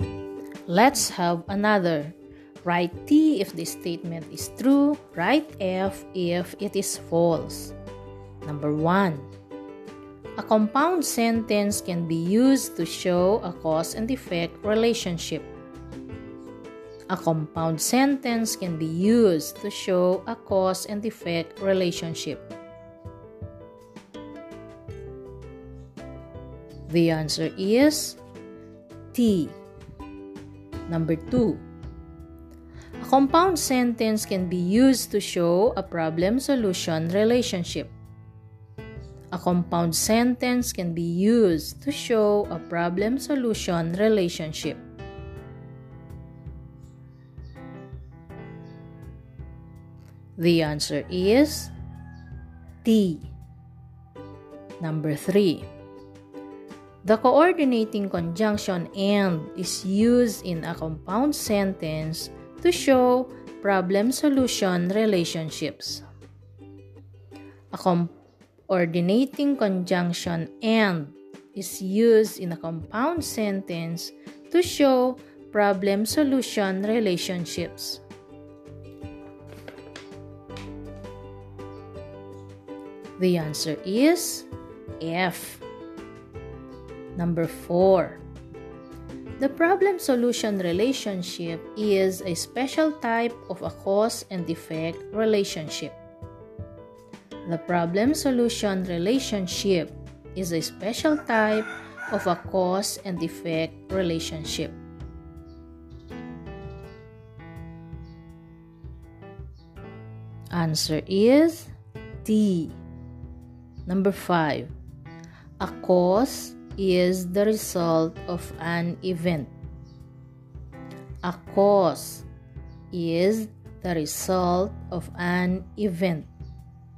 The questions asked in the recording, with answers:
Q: A compound sentence can be used to show a cause and effect relationship.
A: The answer is T.

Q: A compound sentence can be used to show a problem-solution relationship.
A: The answer is T.

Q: The coordinating conjunction AND is used in a compound sentence to show problem-solution relationships.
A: The answer is F.

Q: The problem-solution relationship is a special type of a cause and effect relationship.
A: Answer is T.